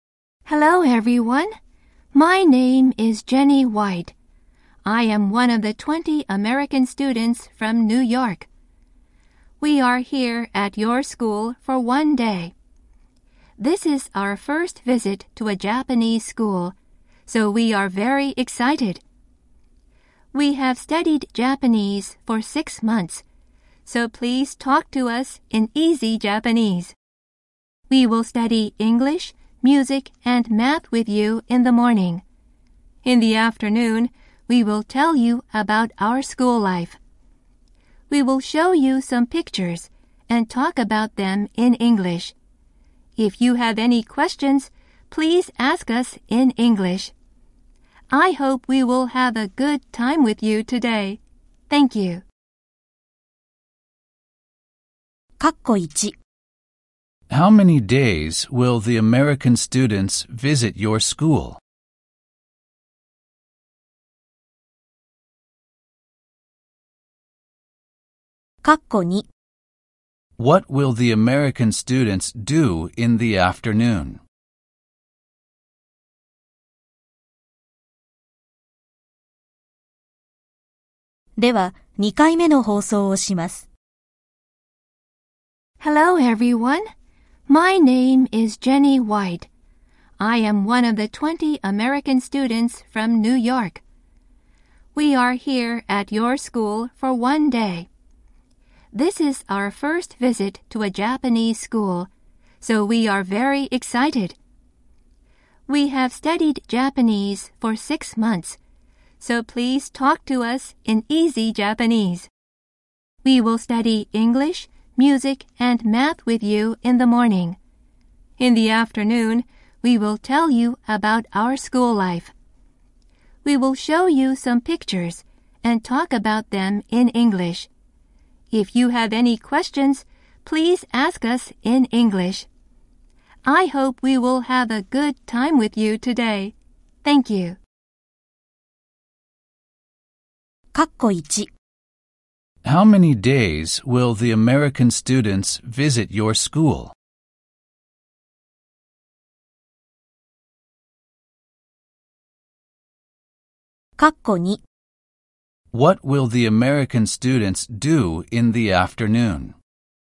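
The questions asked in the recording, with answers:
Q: How many days will the American students visit your school?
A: For one day.

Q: What will the American students do in the afternoon?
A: They will tell about their school life.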